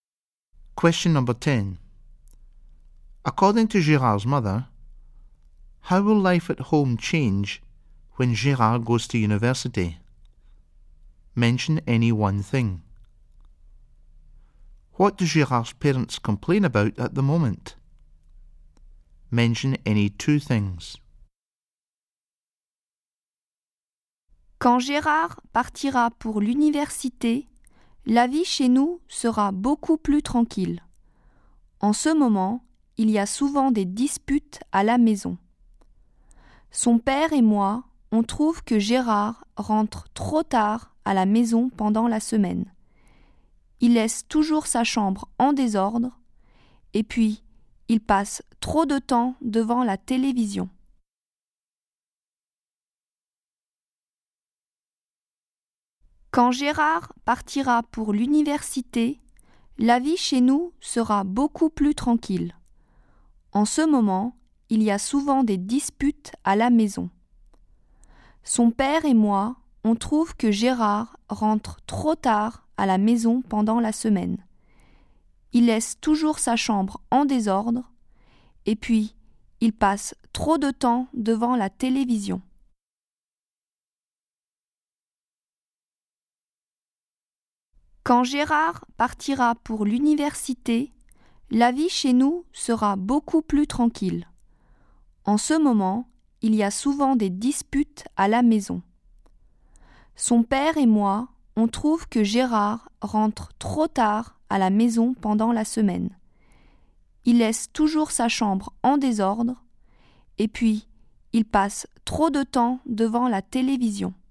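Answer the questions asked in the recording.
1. It will be much quieter
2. Any two of: he comes home too late during the week, leaves his room untidy, watches too much TV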